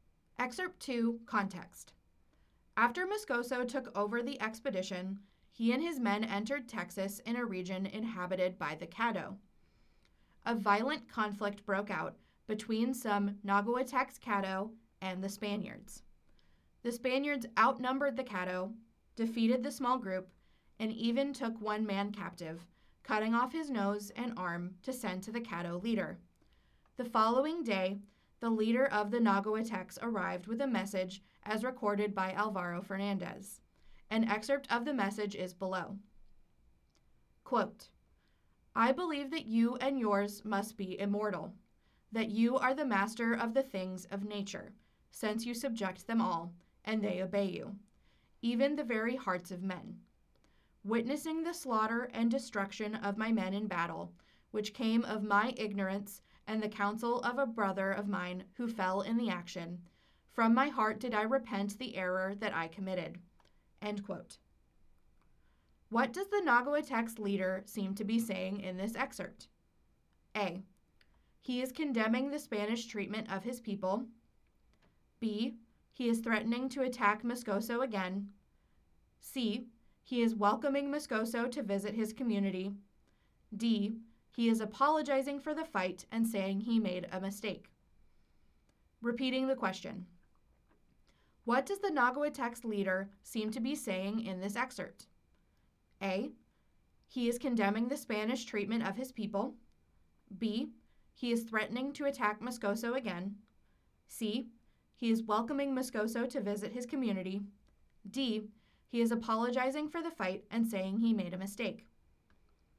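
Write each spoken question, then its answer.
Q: What does the Nahuatl leader seem to be saying in this excerpt?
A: D: He is apologizing for the fight and saying he made a mistake.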